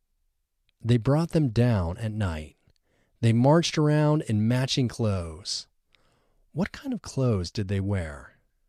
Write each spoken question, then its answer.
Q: What kind of clothes did they wear?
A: They wore matching clothes.